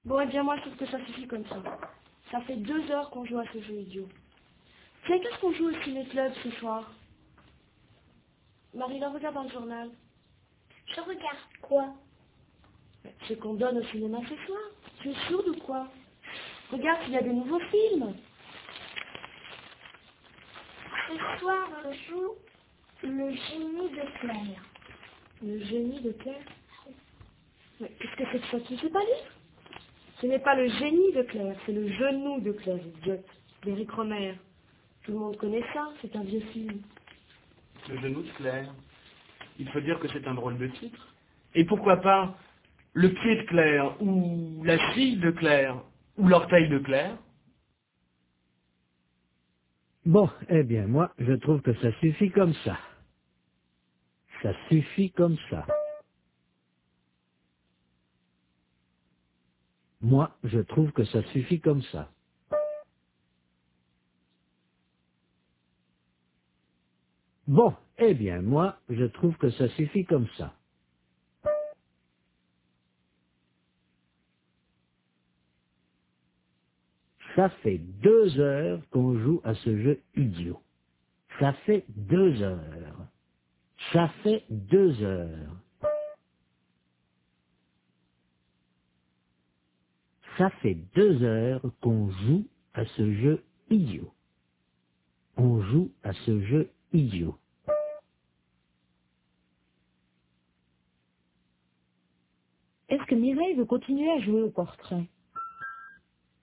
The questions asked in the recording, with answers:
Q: Est-ce que Mireille veut continuer à jouer au portrait?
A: Non, elle trouve que ça suffit comme ça.